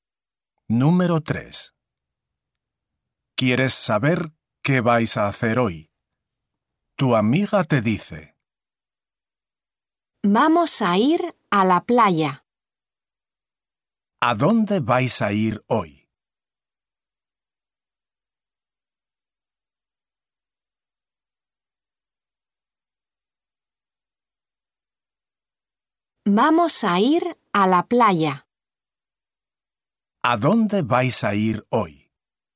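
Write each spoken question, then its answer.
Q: ¿A dónde vais a ir hoy?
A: a la playa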